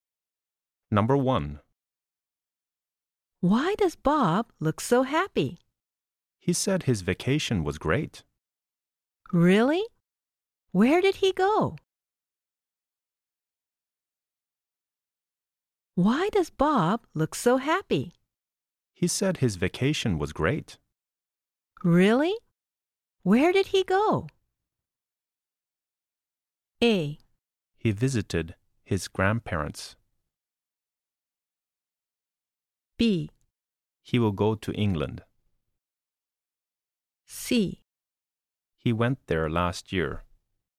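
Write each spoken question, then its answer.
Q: Really?Where did he go?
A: A: He visited his grandparents.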